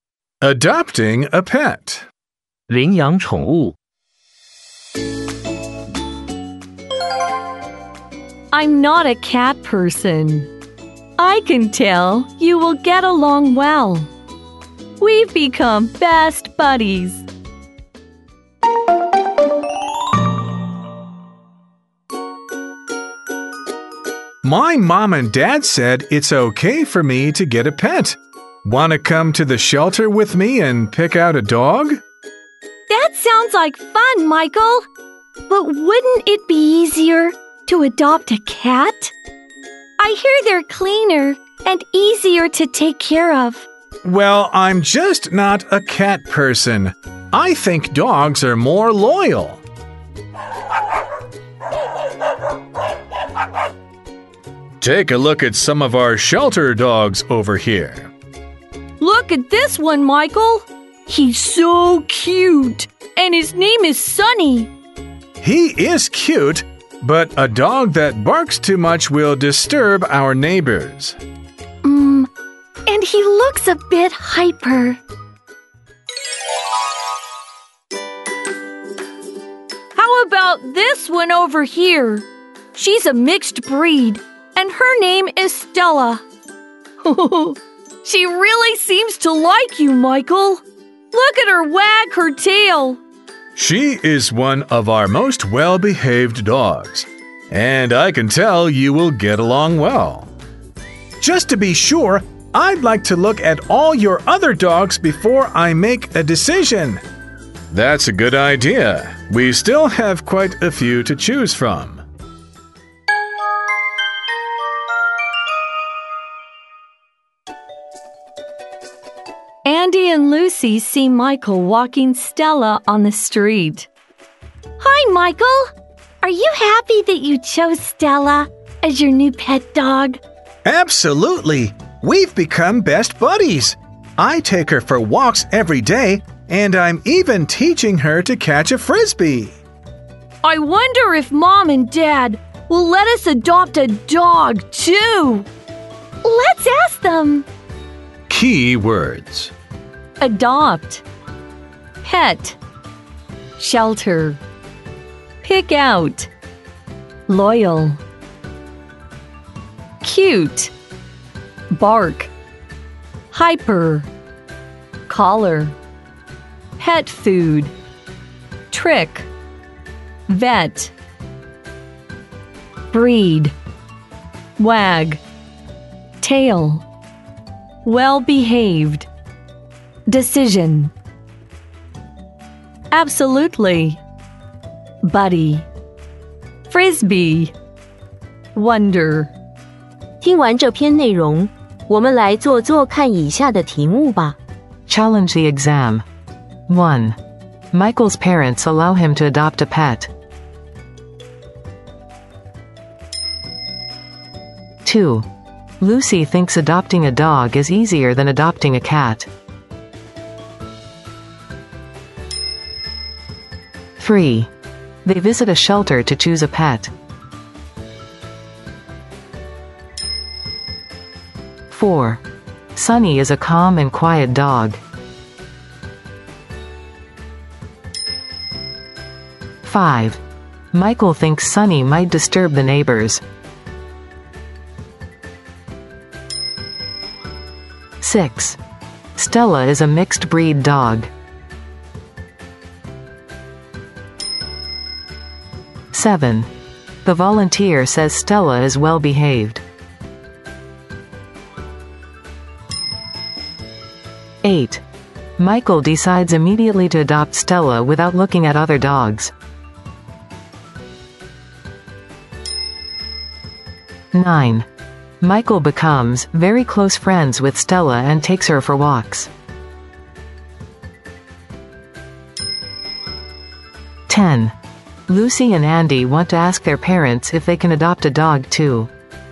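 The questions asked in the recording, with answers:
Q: Michael's parents allow him to adopt a pet.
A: True

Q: Lucy thinks adopting a dog is easier than adopting a cat.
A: False

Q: They visit a shelter to choose a pet.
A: True

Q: Sunny is a calm and quiet dog.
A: False

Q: Stella is a mixed breed dog.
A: True

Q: The volunteer says Stella is well behaved.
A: True

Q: Michael decides immediately to adopt Stella without looking at other dogs.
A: False

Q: Michael becomes very close friends with Stella and takes her for walks.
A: True

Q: Lucy and Andy want to ask their parents if they can adopt a dog too.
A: True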